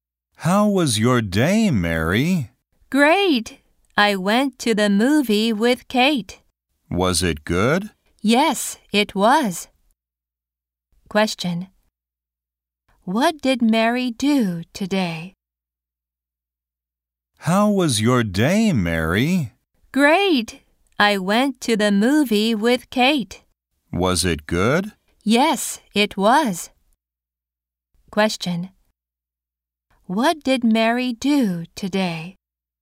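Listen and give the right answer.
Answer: She went to the movie with Kate.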